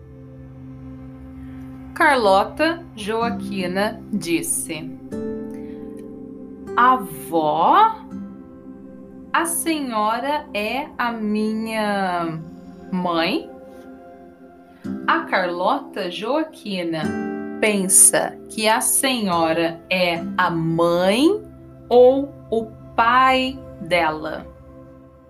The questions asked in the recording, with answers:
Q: A Carlota Joaquina pensa que a senhora é a mãe ou o pai dela.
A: A mãe a Carlota Joaquina pensa que a senhora é a mãe dela.